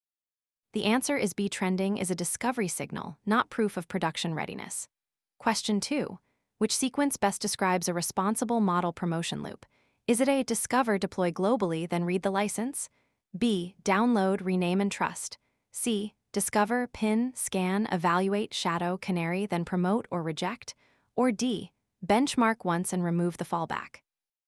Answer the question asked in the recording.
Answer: The answer is C, a staged promotion loop limits risk and produces evidence before production traffic.